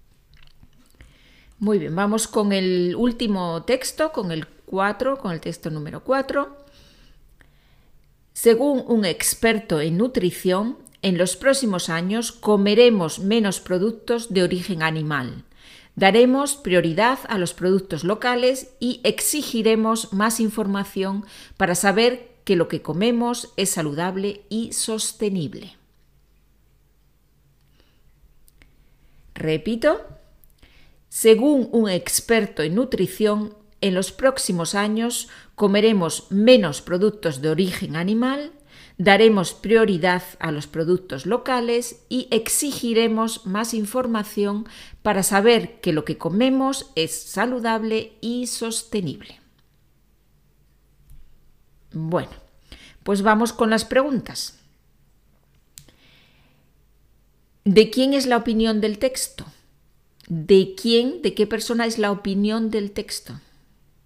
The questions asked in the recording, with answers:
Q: ¿De quién es la opinión del texto?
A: es la opinión de un experto en nutrición.